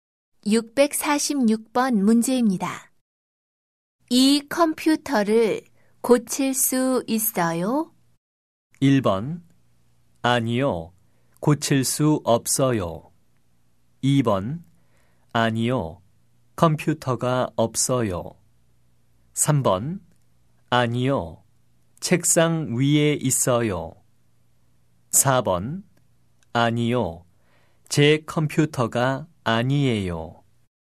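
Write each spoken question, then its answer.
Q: 이 컴퓨터를 고칠 수 있어요?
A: 1번: 아니요, 고칠 수 없어요.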